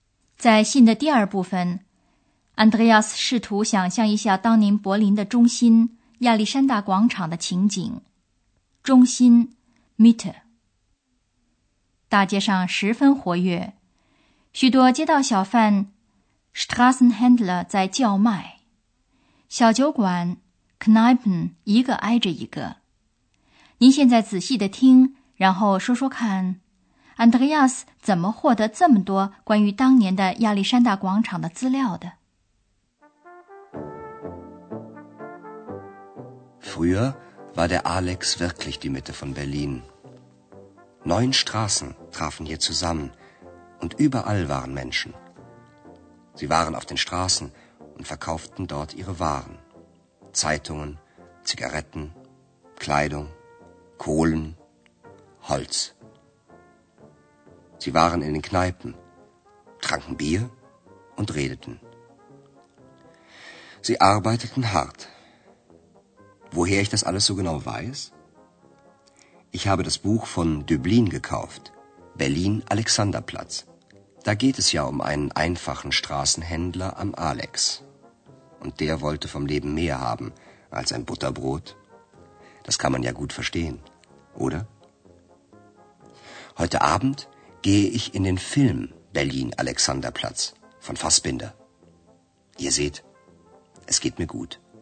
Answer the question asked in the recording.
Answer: 原来他为了对亚历山大广场上的历史有更多的了解,买了德伯林的那本名叫《柏林亚历山大广场》的著名小说。